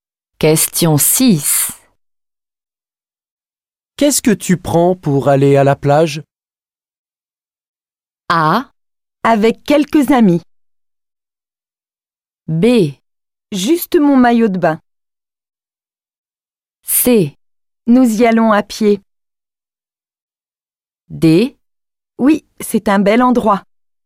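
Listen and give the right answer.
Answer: B: Juste mon maillot de bain.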